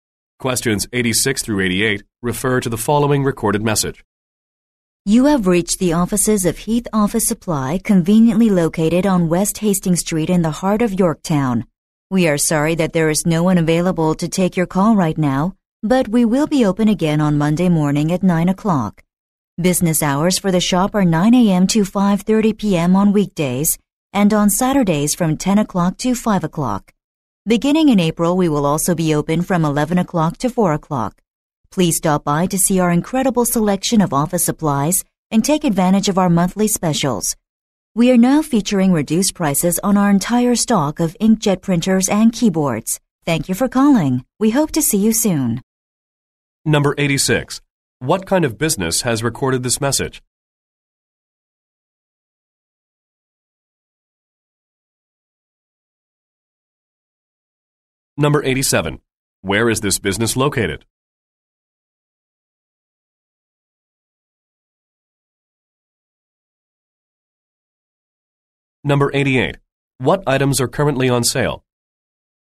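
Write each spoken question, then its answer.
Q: What kind of business has recorded this message?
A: An office supply store

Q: Where is this business located?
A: On West Hastings Street in Yorktown

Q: What items are currently on sale?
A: Inkjet printers and keyboards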